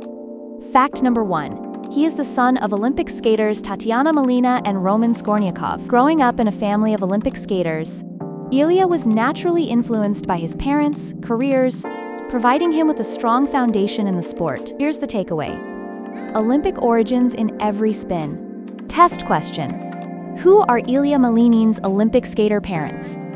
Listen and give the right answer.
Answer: Tatiana Malinina and Roman Skornyakov.